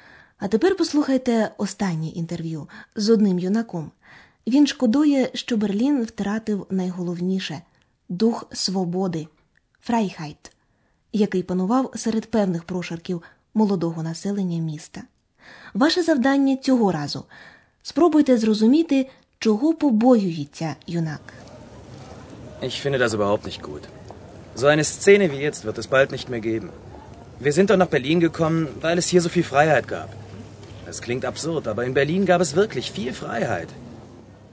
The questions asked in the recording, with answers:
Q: Ваше завдання цього разу спробуйте зрозуміти, чого побоюється юнак.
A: Юнак побоюється, що такої сцени, сцени, відтепер більше не буде.